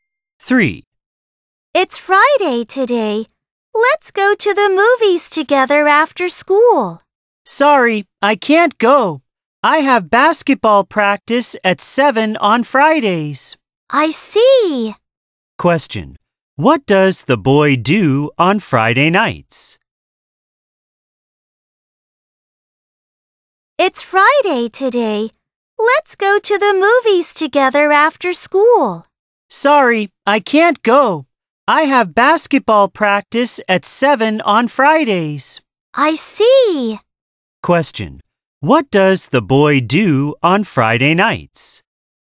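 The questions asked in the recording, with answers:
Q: What does the boy do on Friday nights?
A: He has basketball practice at 7.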